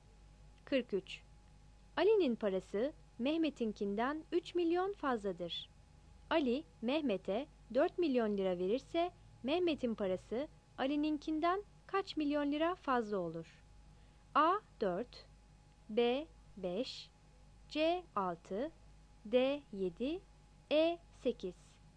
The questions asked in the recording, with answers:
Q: Ali Mehmet'e 4 milyon lira verirse Mehmet'in parası Ali'ninkinden kaç milyon lira fazla olur?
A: 43 B